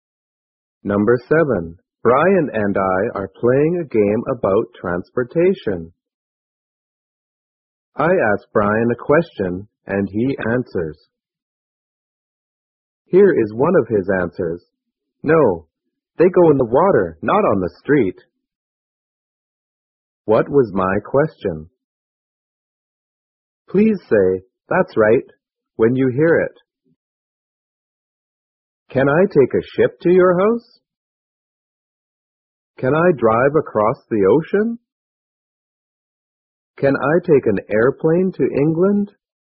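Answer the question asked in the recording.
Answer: Can I take a ship to your house?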